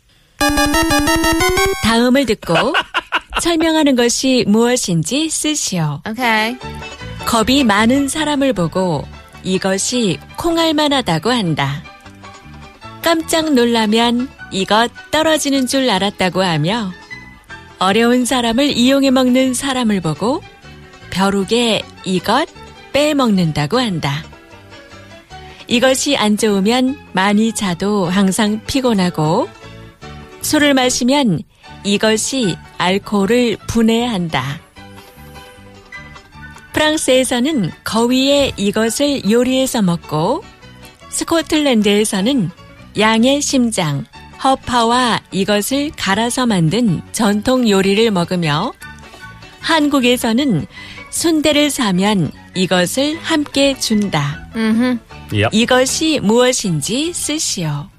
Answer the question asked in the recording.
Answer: Yes, our answer is can the liver.